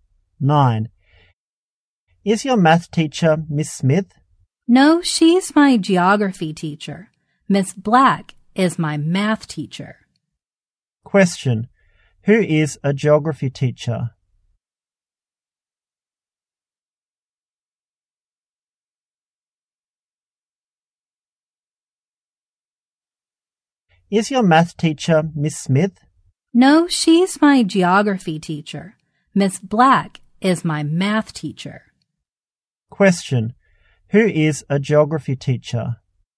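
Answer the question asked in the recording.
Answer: Miss Smith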